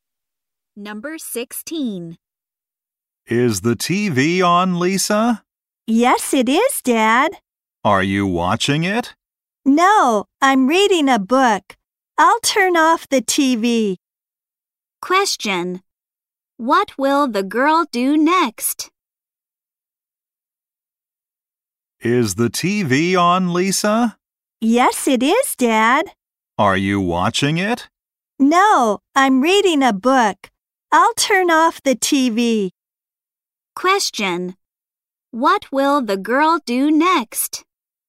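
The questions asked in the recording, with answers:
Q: What will the girl do next?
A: Turn off the TV.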